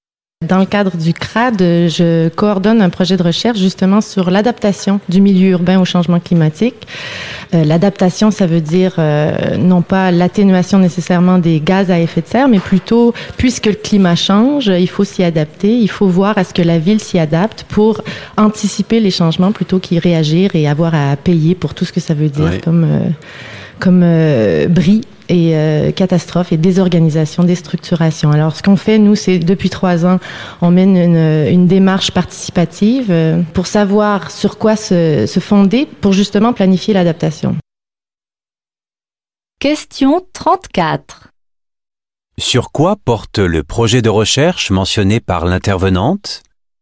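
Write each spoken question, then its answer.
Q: Sur quoi porte le projet de recherche mentionné par l'intervenante ?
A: L'adaptation du milieu urbain au changement climatique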